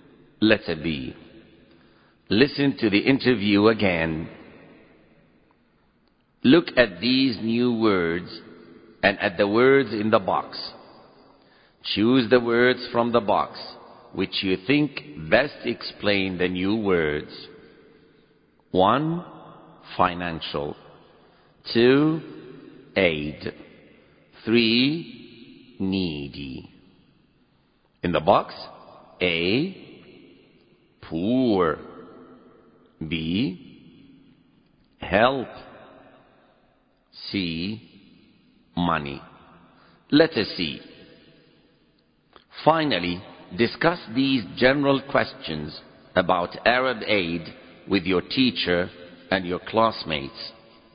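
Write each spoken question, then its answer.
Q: Financial.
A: C: Money

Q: Needy.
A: A: Poor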